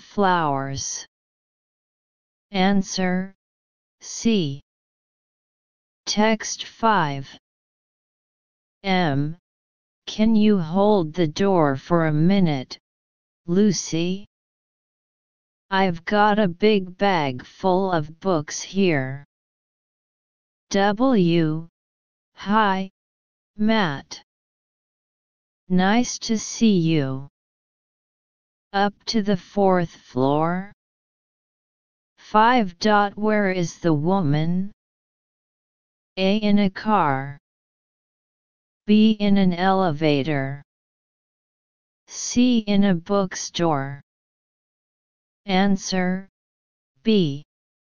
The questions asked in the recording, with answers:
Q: Where is the woman?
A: Answer B.